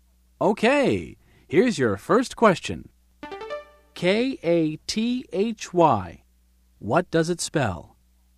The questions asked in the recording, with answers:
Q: K-A-T-H-Y. What does it spell?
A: That's my name, Kathy.